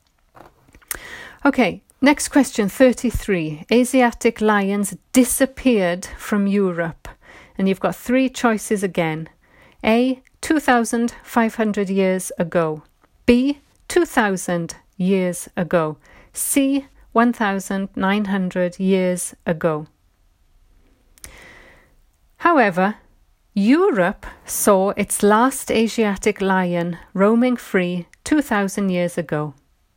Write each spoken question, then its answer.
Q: Asiatic lions disappeared from Europe.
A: So the answer is B, 2,000 years ago.